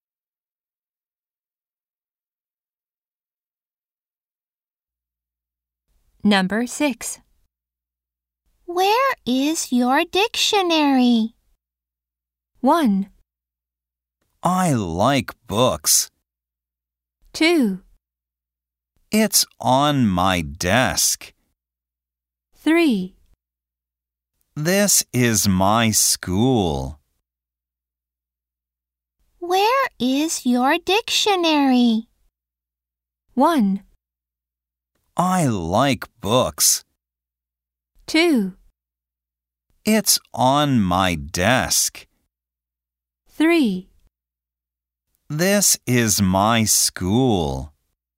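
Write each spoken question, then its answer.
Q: Where is your dictionary?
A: 2: It's on my desk.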